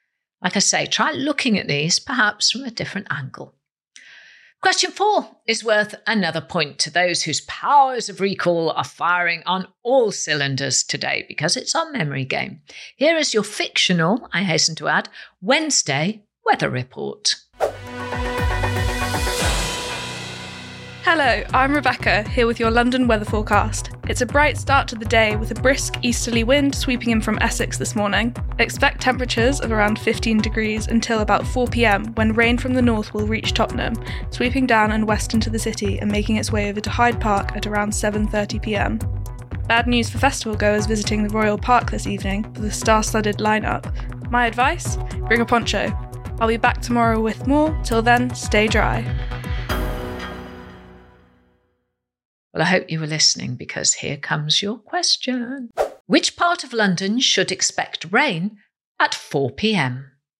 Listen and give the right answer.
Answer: And the answer is Tottenham